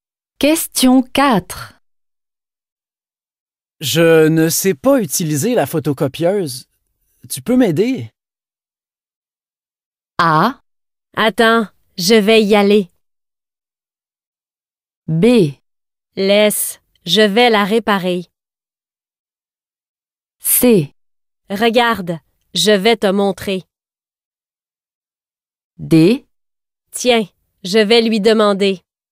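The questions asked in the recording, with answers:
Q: Je ne sais pas utiliser la photocopieuse. Tu peux m'aider?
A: C: Regarde, je vais te montrer.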